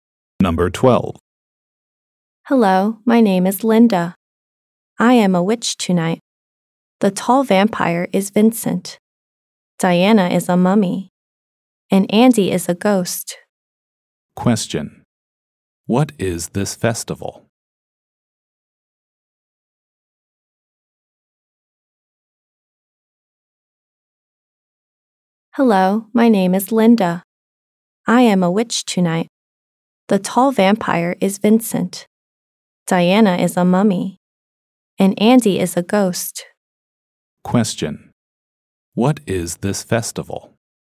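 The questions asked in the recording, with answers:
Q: What is this festival?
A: Halloween.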